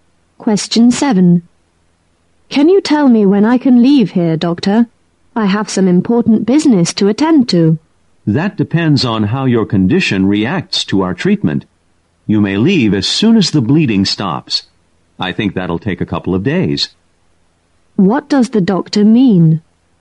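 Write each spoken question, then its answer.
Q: What does the doctor mean?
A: The patient can leave once the bleeding stops, probably in a couple of days.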